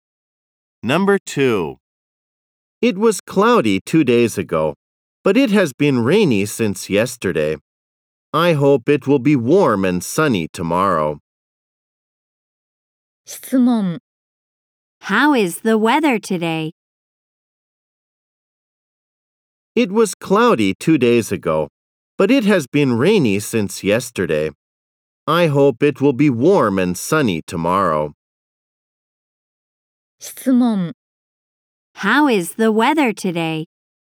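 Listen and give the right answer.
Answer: It is rainy.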